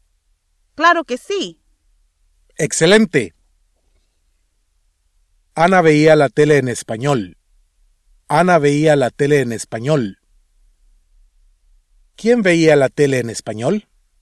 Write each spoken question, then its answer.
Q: ¿Quién veía la tele en español?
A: Ana.